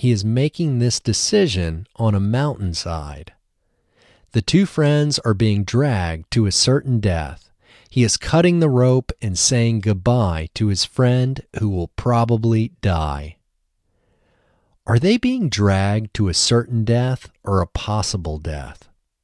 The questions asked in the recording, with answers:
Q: Are they being dragged to a certain death or a possible death?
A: They are being dragged to a certain death.